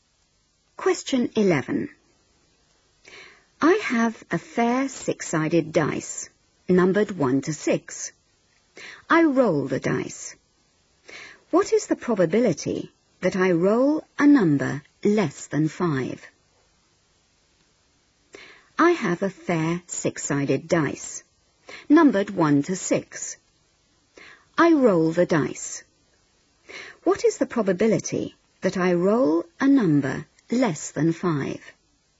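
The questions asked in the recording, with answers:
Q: What is the probability that I roll a number less than 5?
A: 4/6 (2/3)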